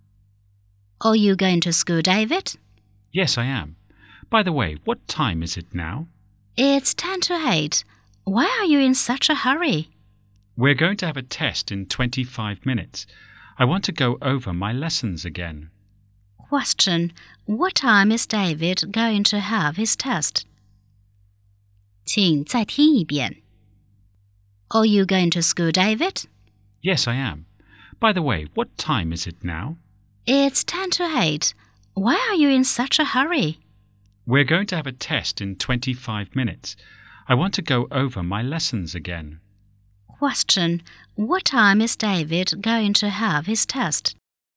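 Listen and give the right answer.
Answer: 8:15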